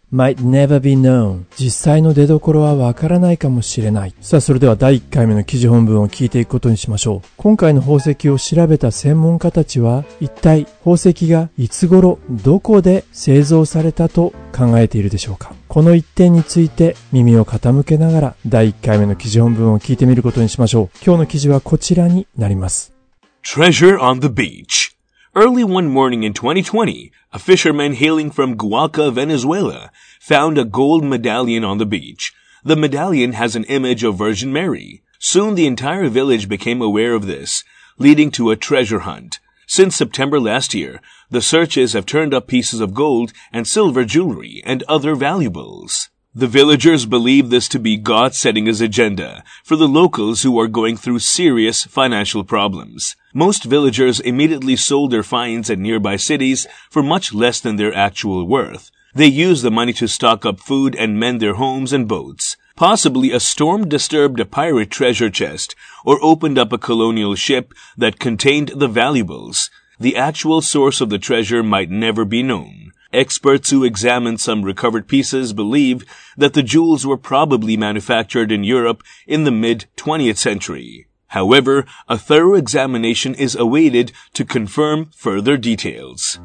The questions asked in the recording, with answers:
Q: 今回の宝石を調べた専門家たちは、一体宝石がいつ頃、どこで製造されたと考えているでしょうか?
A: Experts who examined some recovered pieces believe that the jewels were probably manufactured in Europe in the mid-20th century.